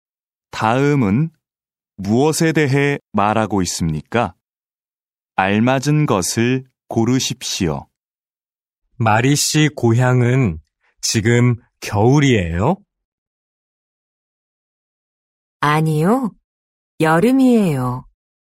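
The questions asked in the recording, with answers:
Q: 다음은 무엇에 대해 말하고 있습니까?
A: 계절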